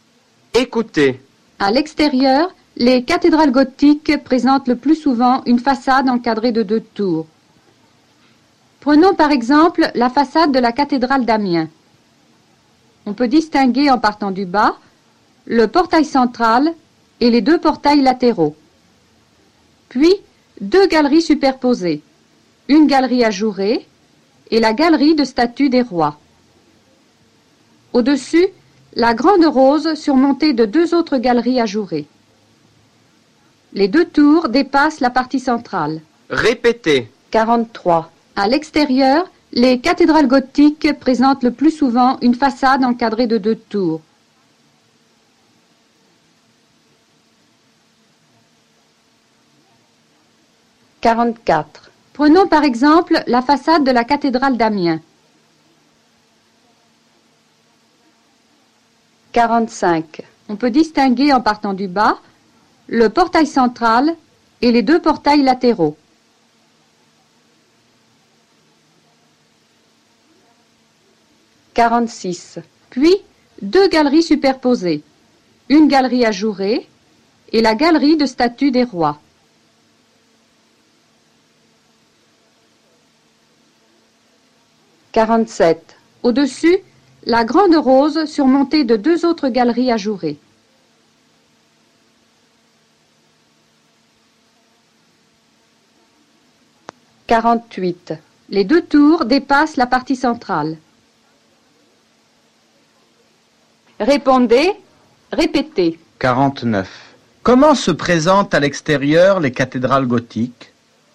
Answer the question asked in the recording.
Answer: À l'extérieur, les cathédrales gothiques présentent le plus souvent une façade encadrée de deux tours.